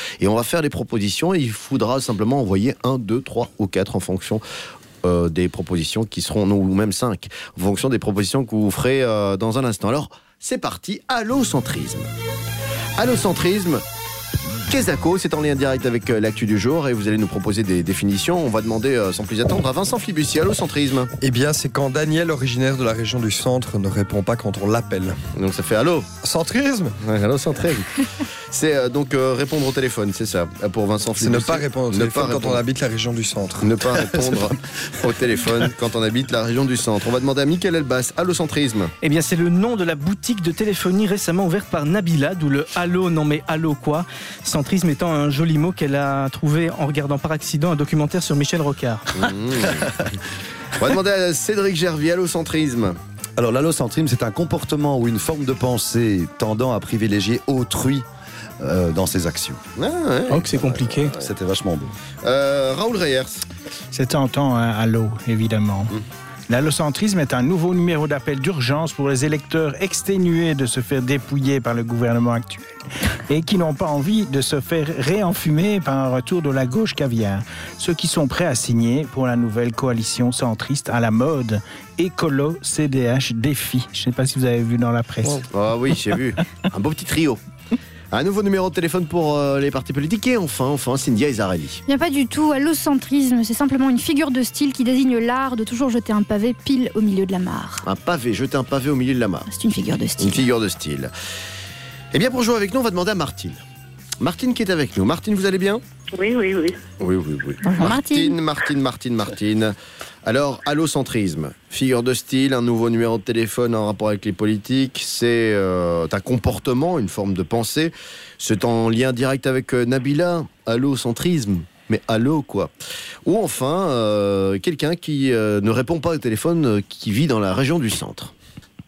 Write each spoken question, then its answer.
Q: Allocentrisme, Kézako, c'est en lien direct avec l'actu du jour et vous allez nous proposer des définitions.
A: Eh bien, vous avez raison, ma chère Martine, c'est effectivement cela.